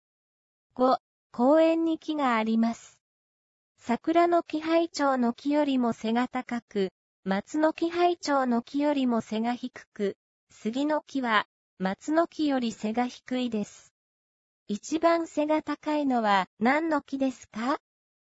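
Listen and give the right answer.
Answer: 桜の木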